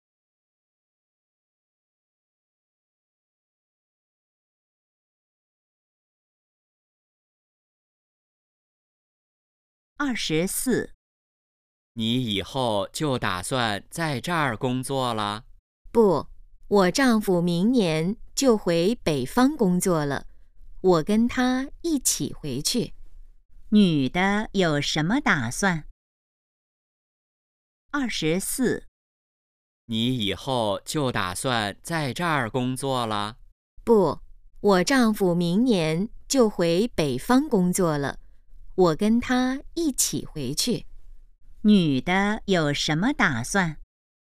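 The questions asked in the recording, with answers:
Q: 女的有什么打算?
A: 跟丈夫回北方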